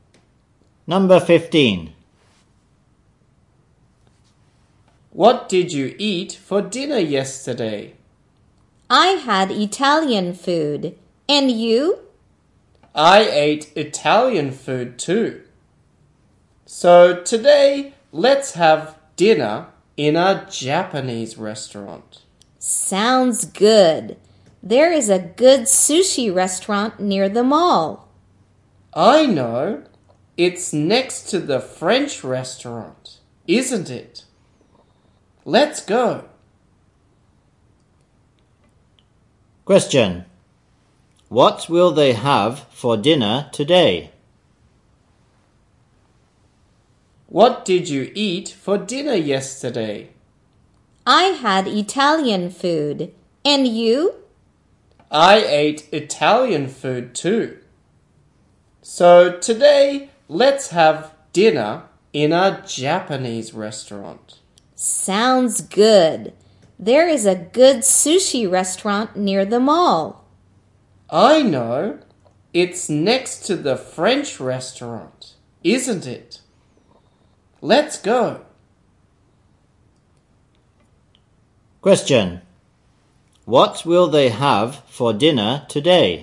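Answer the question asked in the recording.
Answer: Japanese food (sushi)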